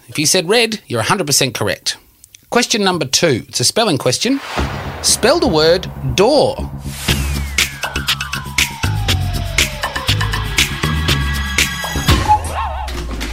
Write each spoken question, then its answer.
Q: Spell the word door.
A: It's D-O-O-R.